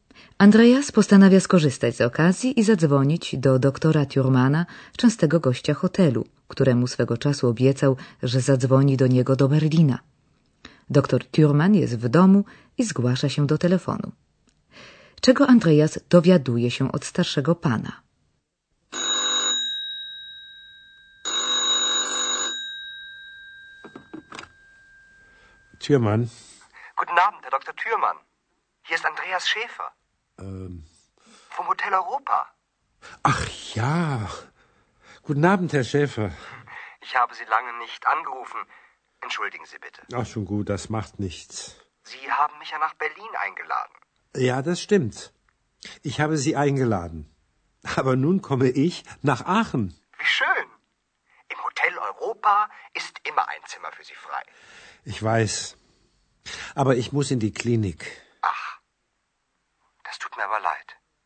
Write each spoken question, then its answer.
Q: Czego Andreas dowiaduje się od starszego pana.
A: Andreas dowiedział się o to, że doktor Thürmann wybiera się wkrótce do Aachen, do kliniki, tym razem jednak jako pacjent.